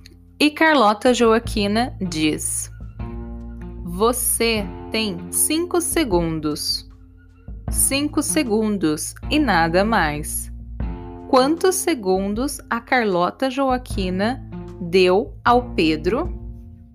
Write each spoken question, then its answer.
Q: Quantos segundos a Carlota Joaquina deu ao Pedro?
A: cinco segundos. Ela deu cinco segundos para que ele se explicasse.